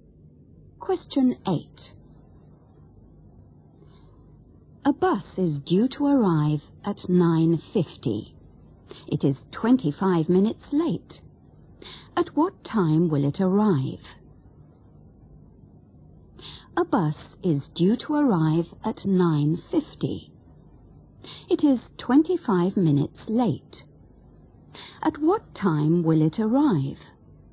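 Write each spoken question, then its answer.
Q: It is 25 minutes late. At what time will it arrive?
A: 10:15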